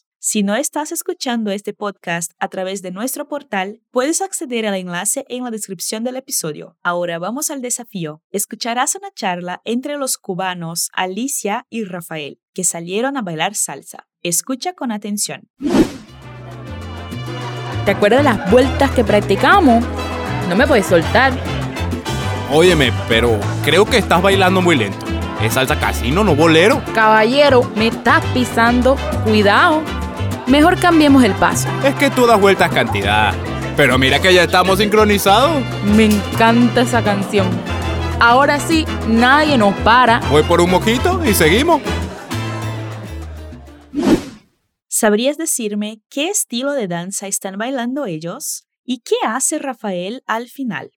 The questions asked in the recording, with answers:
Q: ¿Sabrías decirme qué estilo de danza están bailando ellos?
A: Alicia y Rafael son amigos y salieron a bailar salsa.